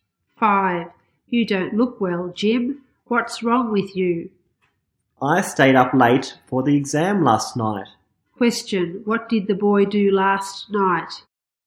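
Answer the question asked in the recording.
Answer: He stayed up late for the exam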